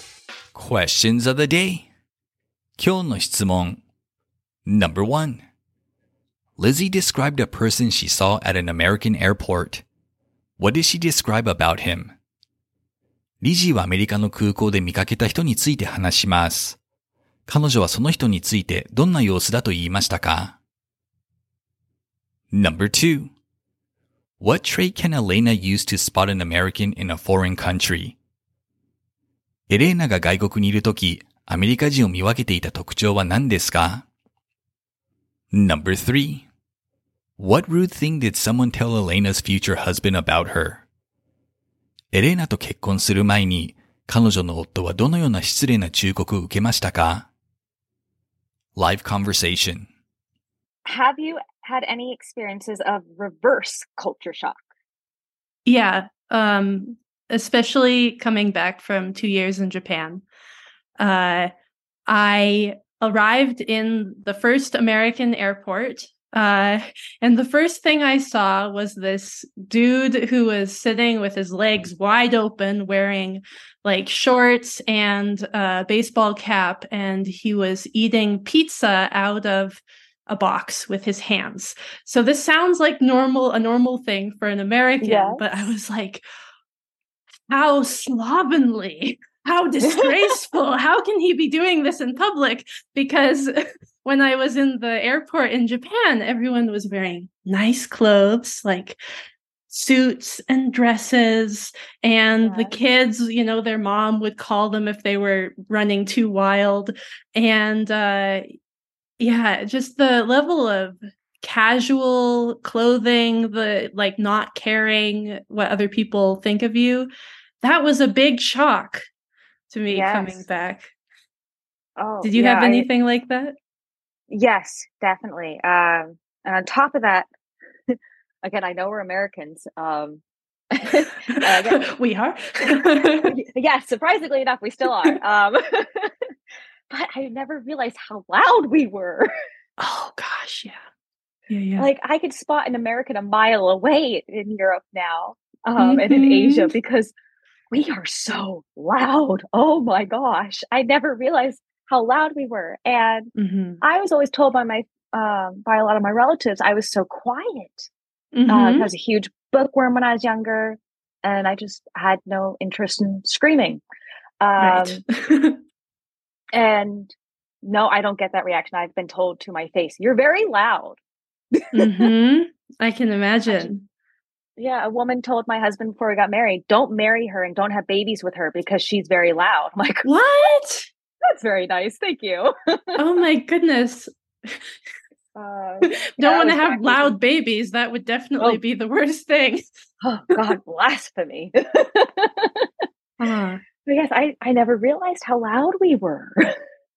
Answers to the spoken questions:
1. She said this person was wearing shorts, baseball cap, and sitting with his legs wide open, something that shocked her upon returning from Japan.
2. She says she can spot Americans abroad due to their loud voices.
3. A woman rudely told Elena's future husband not to marry her because she was loud, something she was not known for being when she was young.